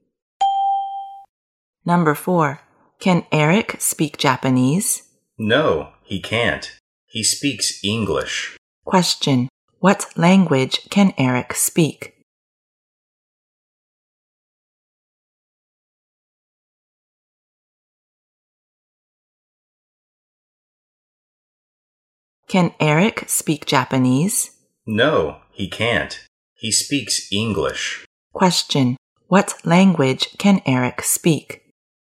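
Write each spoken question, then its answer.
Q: what language can Eric speak?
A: English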